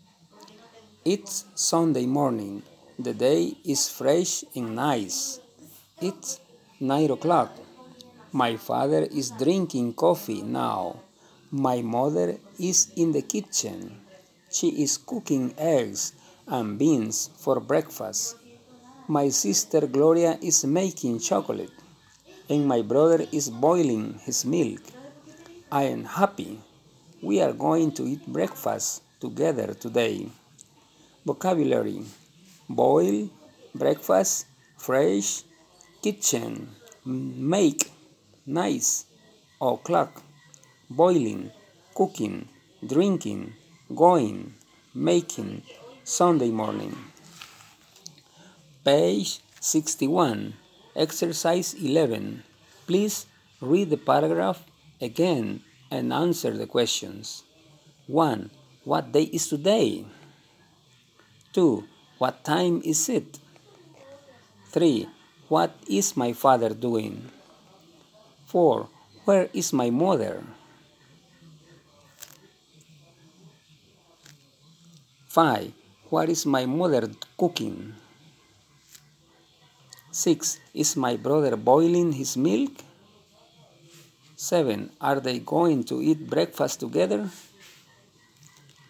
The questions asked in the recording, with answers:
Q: What day is today?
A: It's Sunday morning.

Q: What time is it?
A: It's 9 o'clock.

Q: What is my father doing?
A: My father is drinking coffee.

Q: Where is my mother?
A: My mother is in the kitchen.

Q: What is my mother cooking?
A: My mother is cooking eggs and beans for breakfast.

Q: Is my brother boiling his milk?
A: Yes, my brother is boiling his milk.

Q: Are they going to eat breakfast together?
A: Yes, we are going to eat breakfast together.